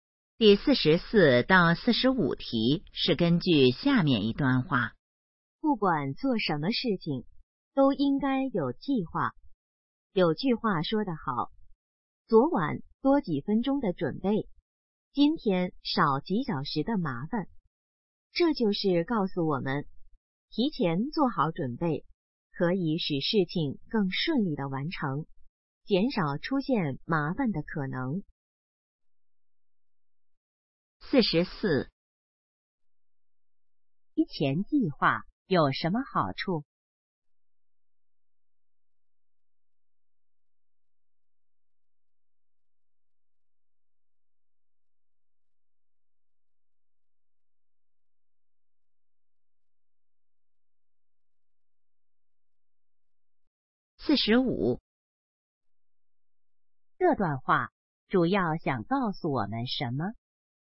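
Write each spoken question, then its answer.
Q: 提前计划有什么好处?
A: 使事情更顺利,减少麻烦

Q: 这段话主要想告诉我们什么?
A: 做事要有计划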